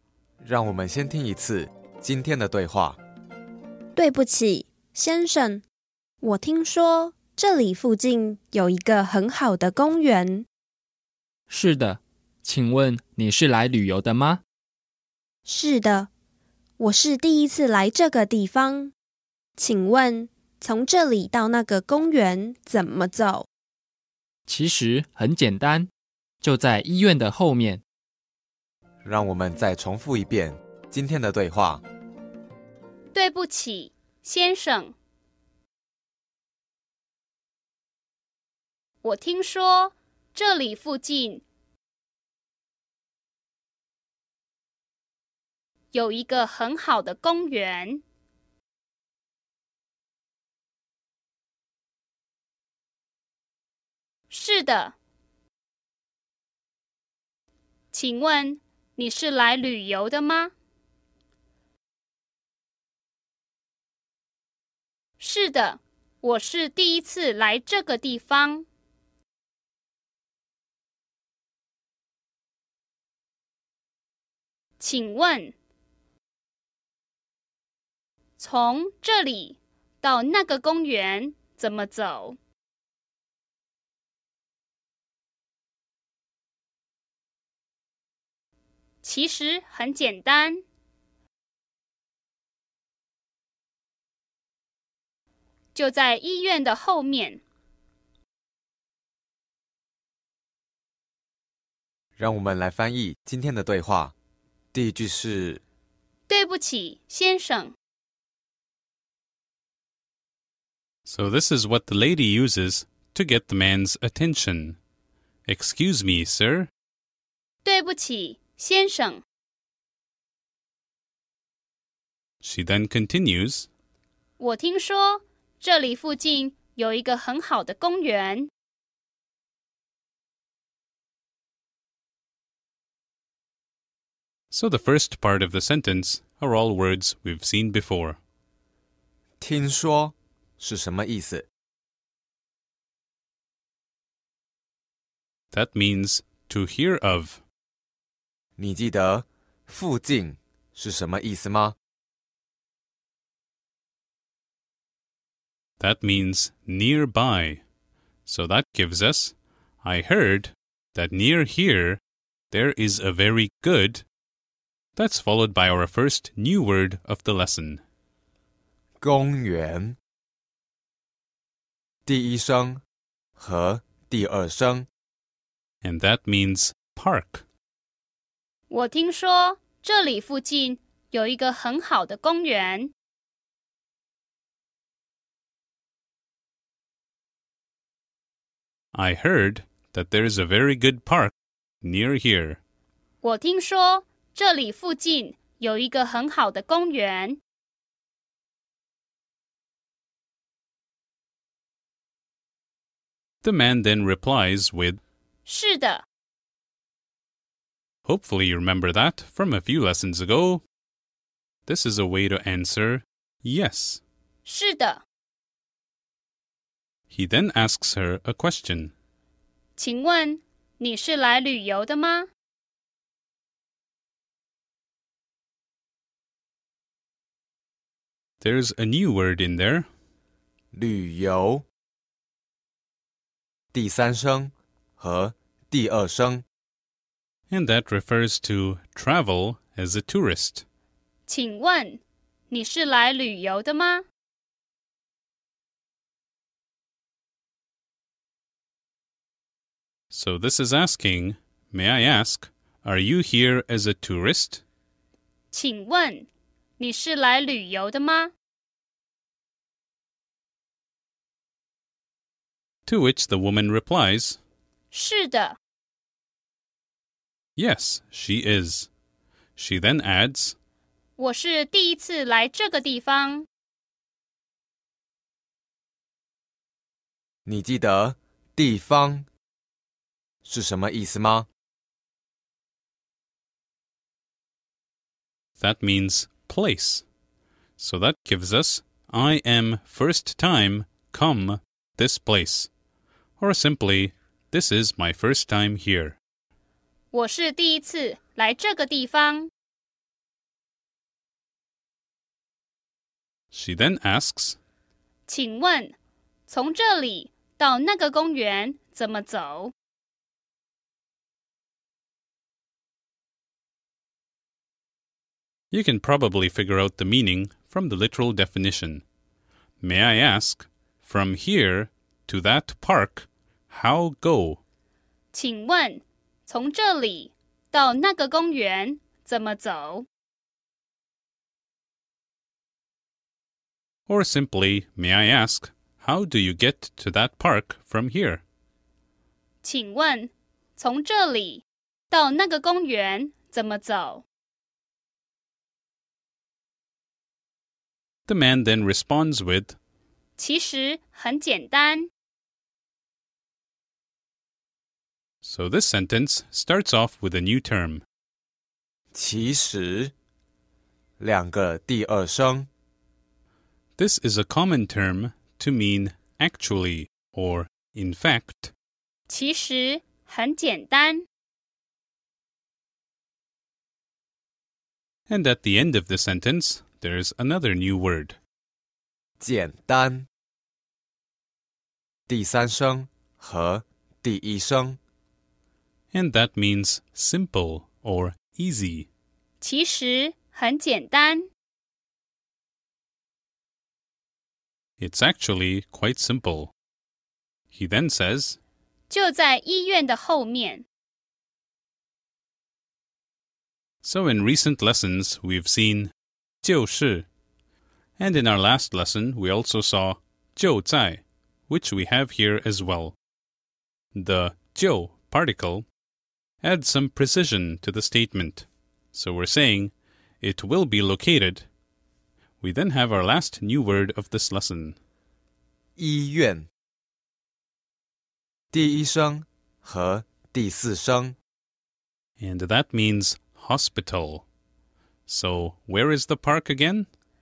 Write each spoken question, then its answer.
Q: So where is the park again?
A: 就在医院的后面。